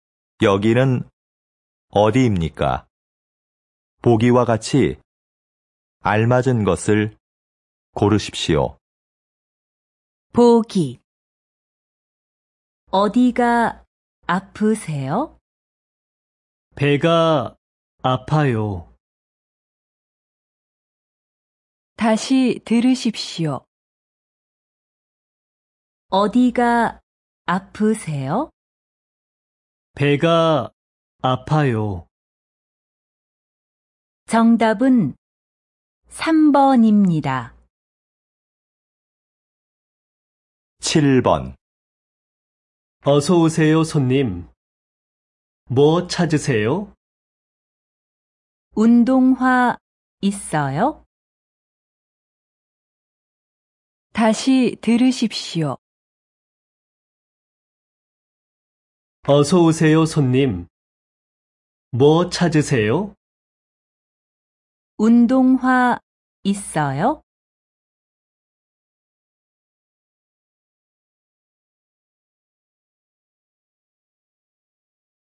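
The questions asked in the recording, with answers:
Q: 여기는 어디입니까?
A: 신발 가게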